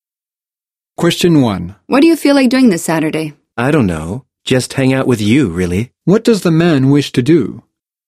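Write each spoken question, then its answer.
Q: What does the man wish to do?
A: Hang out with the woman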